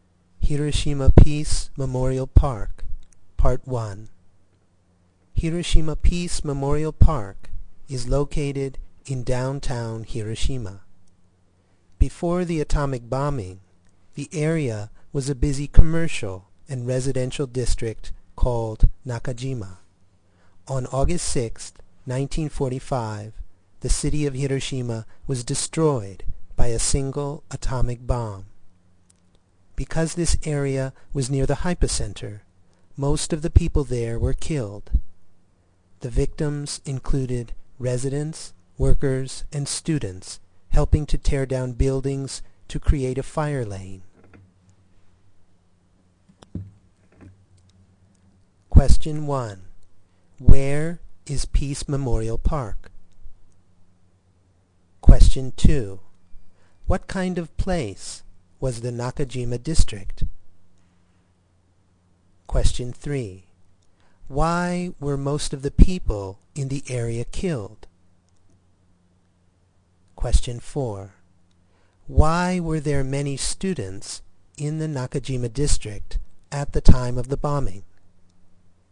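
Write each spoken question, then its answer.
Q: Where is Peace Memorial Park?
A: In downtown Hiroshima

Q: What kind of place was the Nakajima District?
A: A busy commercial and residential district

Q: Why were most of the people in the area killed?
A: Because the area was near the hypocenter

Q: Why were there many students in the Nakajima District at the time of the bombing?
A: They were helping to tear down buildings to create a fire lane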